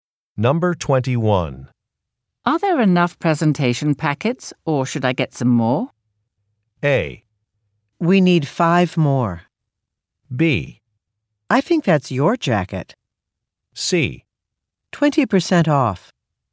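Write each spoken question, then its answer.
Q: Are there enough presentation packets, or should I get some more?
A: A: We need 5 more.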